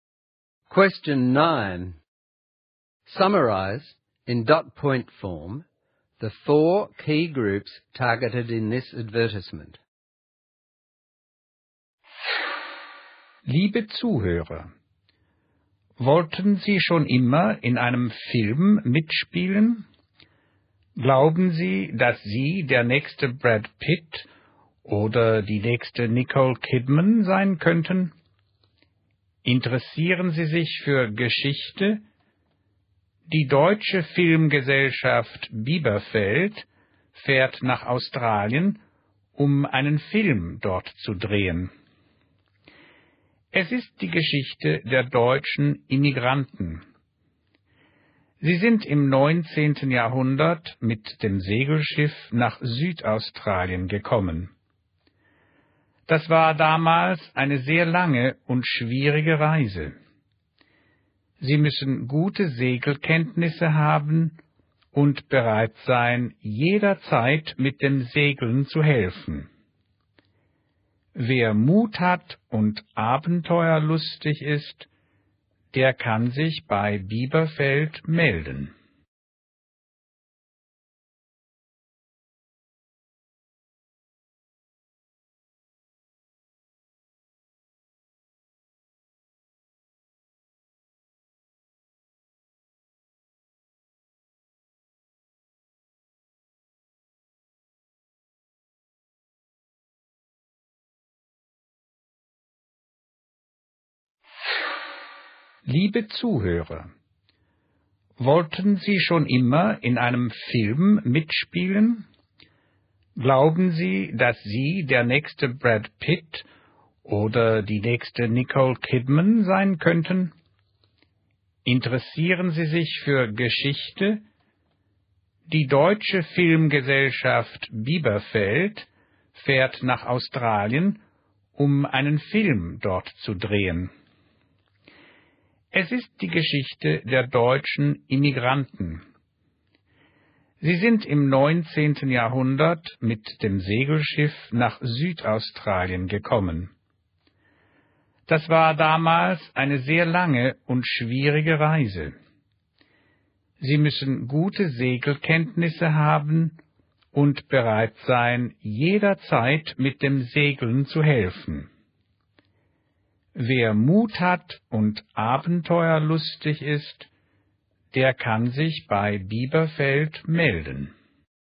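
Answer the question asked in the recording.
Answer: People who want to act in a film; people interested in history; people with good sailing skills; courageous, adventurous people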